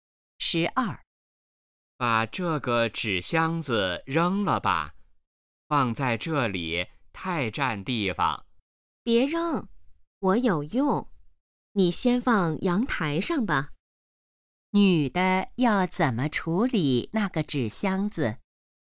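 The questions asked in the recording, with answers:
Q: 女的要怎么处理那个纸箱子?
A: 先放阳台上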